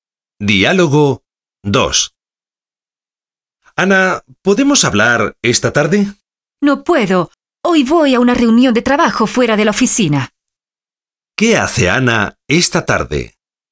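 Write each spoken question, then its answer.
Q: ¿Qué hace Ana esta tarde?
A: Va a una reunión de trabajo fuera de la oficina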